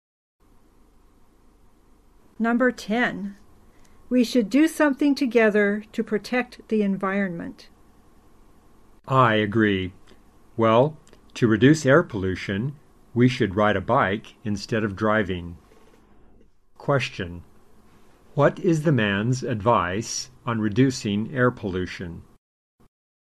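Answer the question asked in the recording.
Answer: Ride a bike instead of driving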